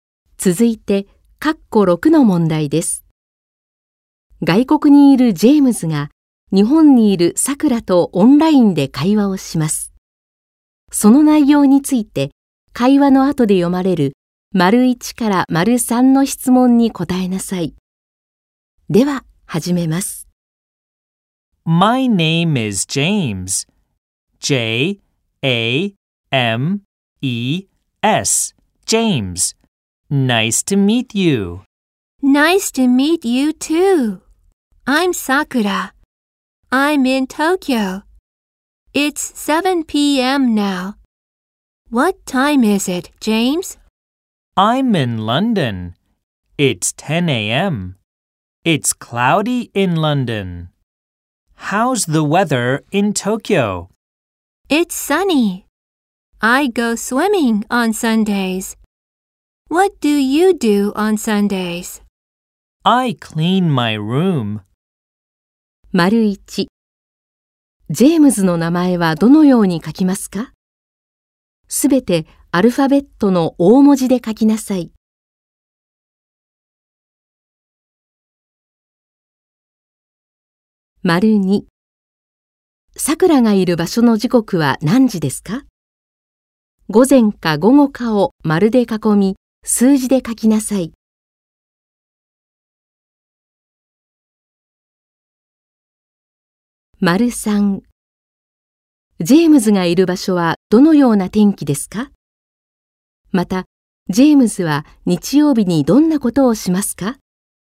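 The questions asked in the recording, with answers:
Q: ジェームズの名前はどのように書きますか?すべてアルファベットの大文字で書きなさい。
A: JAMES

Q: さくらがいる場所の時刻は何時ですか?午前か午後かを丸で囲み、数字で書きなさい。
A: 午後7時

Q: ジェームズがいる場所はどのような天気ですか?また、ジェームズは日曜日にどんなことをしますか?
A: くもり;自分の部屋をそうじする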